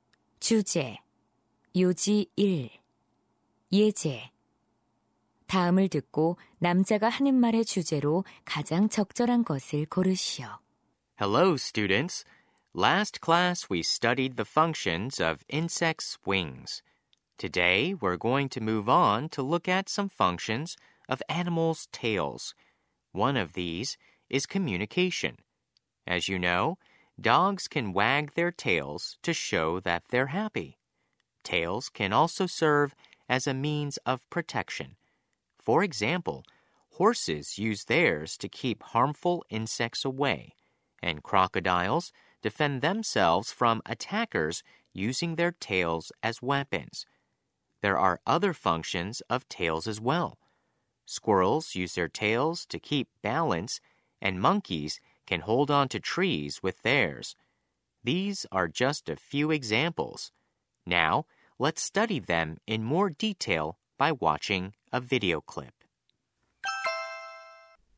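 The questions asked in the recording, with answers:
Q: 다음을 듣고 남자가 하는 말의 주제로 가장 적절한 것을 고르시오.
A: 동물 꼬리의 다양한 기능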